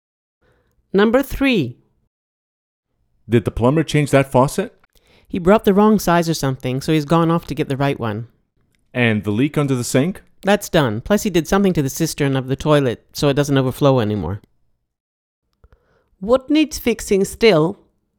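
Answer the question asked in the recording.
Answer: The faucet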